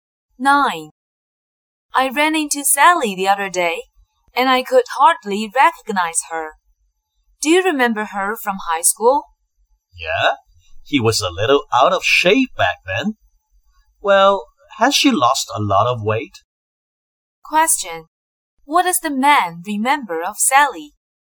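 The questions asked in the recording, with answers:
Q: What does the man remember of Sally?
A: She was a little out of shape (overweight) in high school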